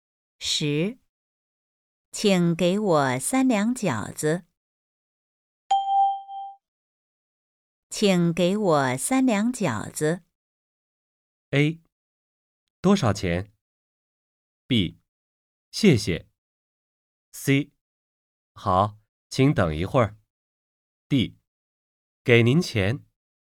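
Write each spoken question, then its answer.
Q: 请给我三两饺子。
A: C: 好,请等一会儿。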